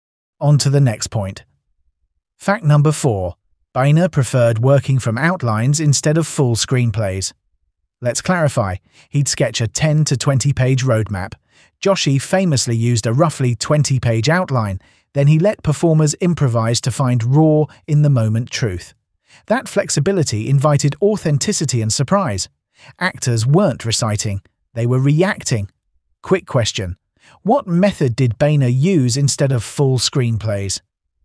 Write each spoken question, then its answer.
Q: what method did Boehner use instead of full screenplays?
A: outlines.